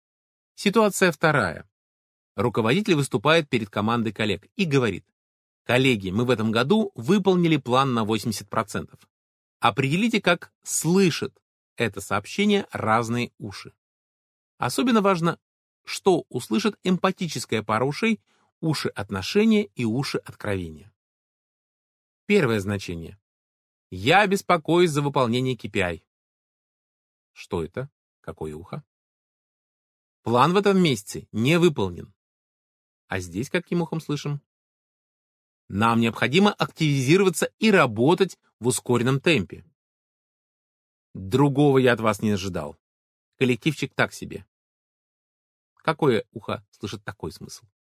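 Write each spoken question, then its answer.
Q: Что это? Какое ухо?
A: откровение

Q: А здесь каким ухом слышим?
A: факт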